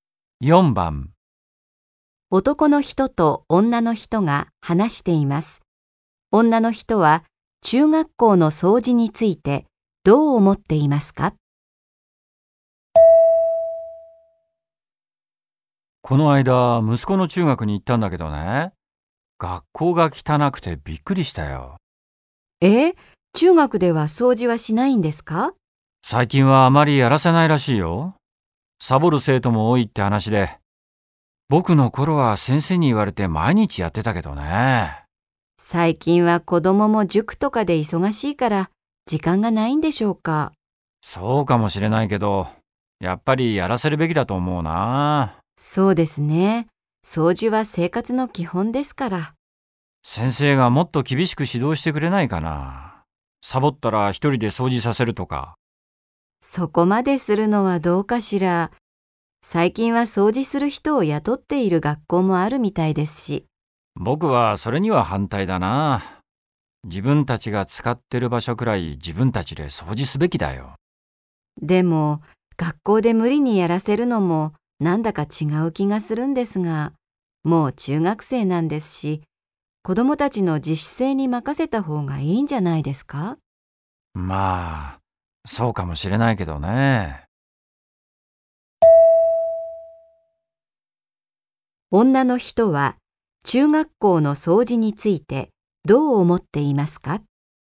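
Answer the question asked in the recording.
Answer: 無理にやらせず、子供たちの自主性に任せた方がいい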